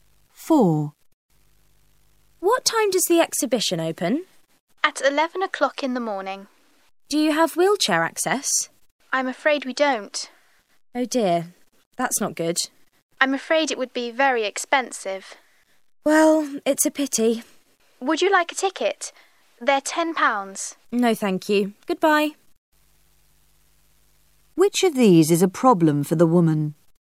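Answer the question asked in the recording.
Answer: There is no wheelchair access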